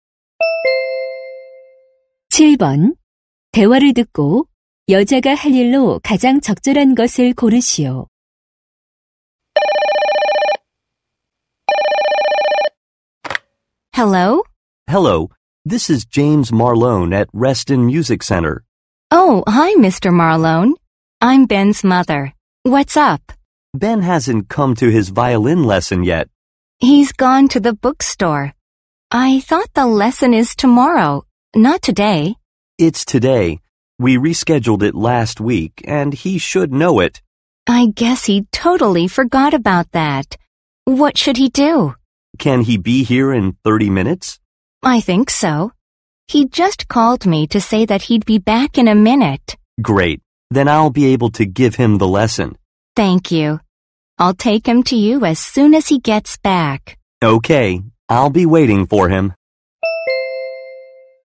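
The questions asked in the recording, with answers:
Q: 대화를 듣고 여자가 할 일로 가장 적절한 것을 고르시오.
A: 아들 Ben을 바이올린 레슨에 데려다주기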